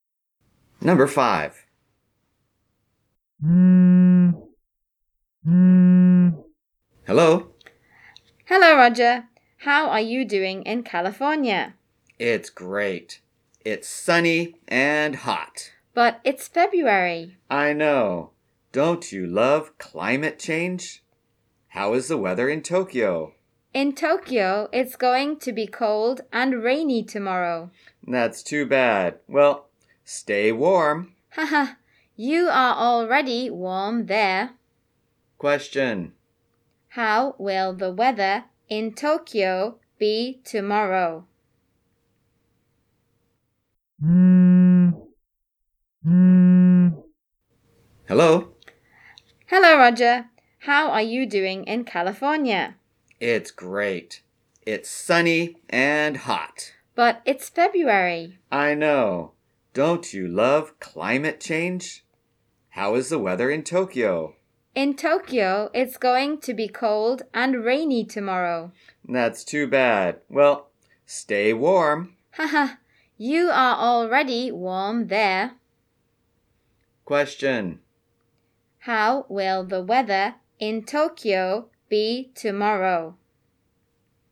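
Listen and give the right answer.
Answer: Cold and rainy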